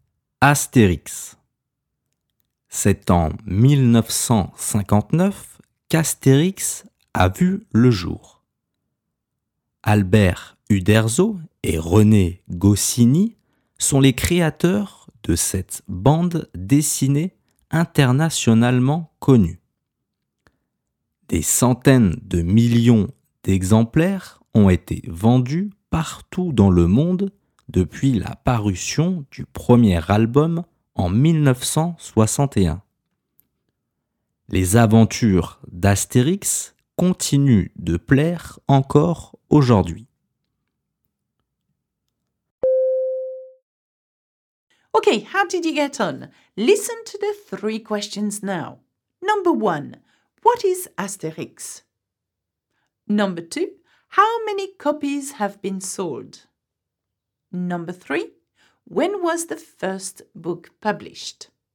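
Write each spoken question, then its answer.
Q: what is Asterix?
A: An internationally known comic strip (bande dessinée)

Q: how many copies have been sold?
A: Hundreds of millions

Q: when was the first book published?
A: 1961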